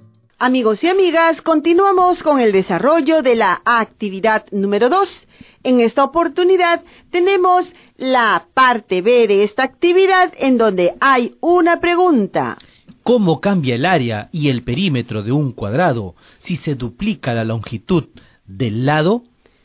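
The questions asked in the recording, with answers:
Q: ¿Cómo cambia el área y el perímetro de un cuadrado si se duplica la longitud del lado?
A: El área se cuadruplica y el perímetro se duplica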